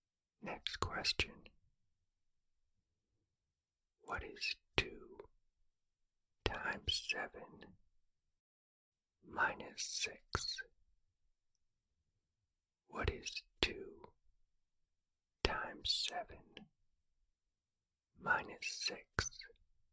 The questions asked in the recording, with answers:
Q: What is 2 times 7 minus 6?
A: The answer is 8.